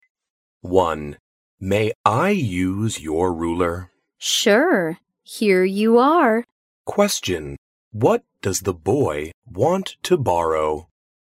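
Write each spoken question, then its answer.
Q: What does the boy want to borrow?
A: A ruler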